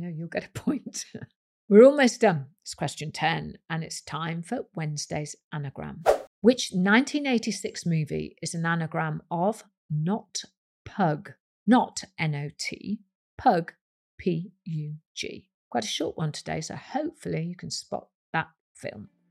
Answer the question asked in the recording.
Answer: It was Top Gun.